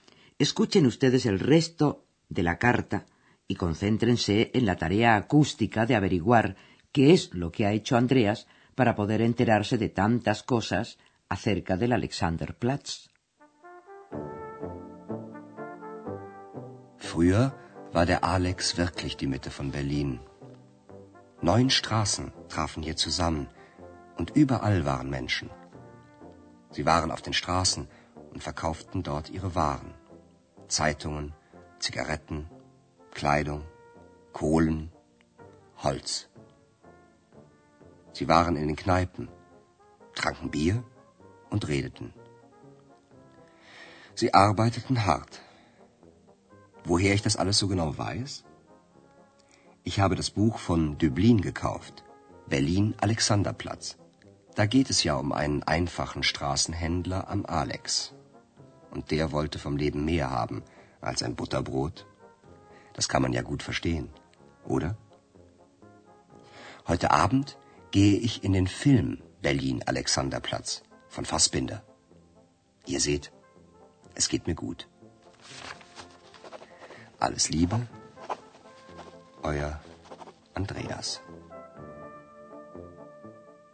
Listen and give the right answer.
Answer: Para poder saber más acerca de la vida que había antes en la Alexanderplatz, Andreas se ha comprado la famosa novela de Alfred Döblin, titulada precisamente con el nombre de la plaza